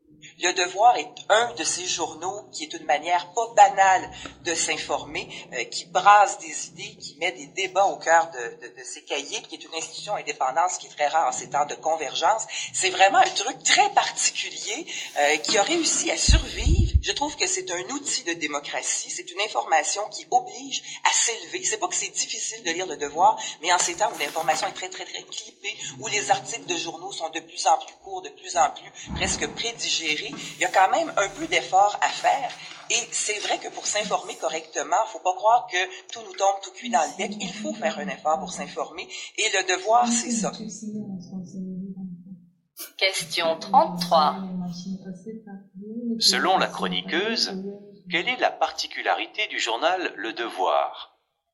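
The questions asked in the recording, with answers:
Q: Selon la chroniqueuse, quelle est la particularité du journal Le Devoir?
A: Indépendant, il exige un effort de lecture pour s'informer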